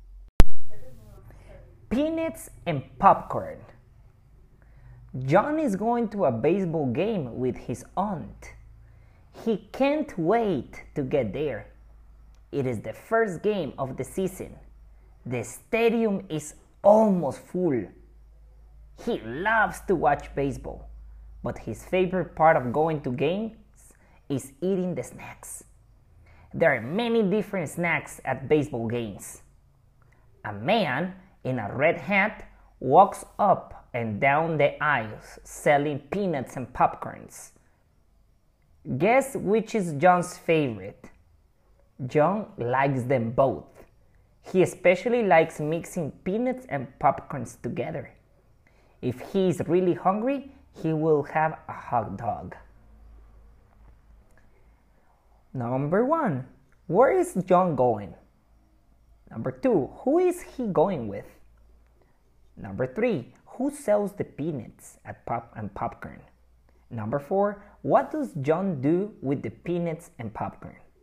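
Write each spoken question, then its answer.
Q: where is John going?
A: to a baseball game

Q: who is he going with?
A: his aunt

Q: who sells the peanuts and popcorn?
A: a man in a red hat

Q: what does John do with the peanuts and popcorn?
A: mixes them together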